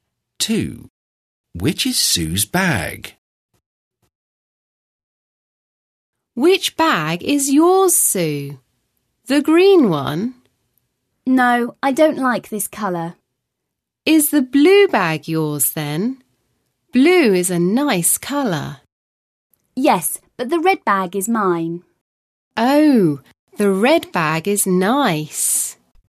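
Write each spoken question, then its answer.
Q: Which is Sue's bag?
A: The red bag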